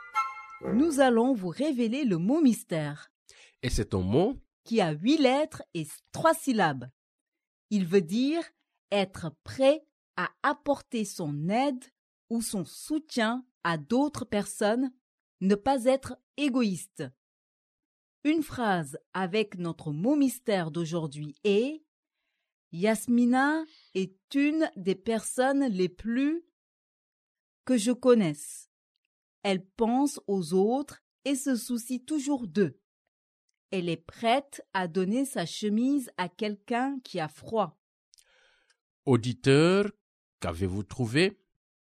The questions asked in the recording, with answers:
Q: Auditeur, qu'avez-vous trouvé?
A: Le mot mystère d'aujourd'hui est généreux.